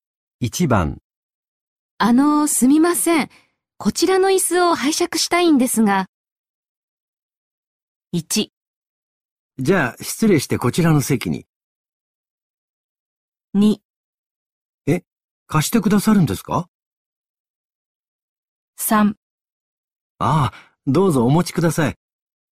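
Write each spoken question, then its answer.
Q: すみません、こちらの椅子を拝借したいんですが。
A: 3: ああどうぞお持ちください。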